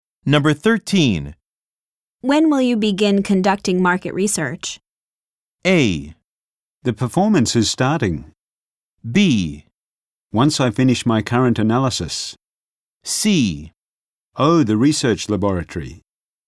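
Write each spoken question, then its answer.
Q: When will you begin conducting market research?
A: B: Once I finish my current analysis.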